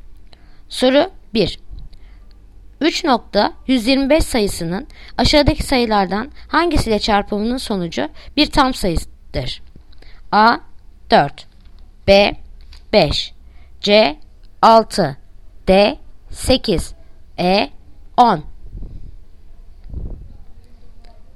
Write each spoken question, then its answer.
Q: 3.125 sayısının aşağıdaki sayılardan hangisiyle çarpımının sonucu bir tam sayıdır?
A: Yanıt Diyarbakır 8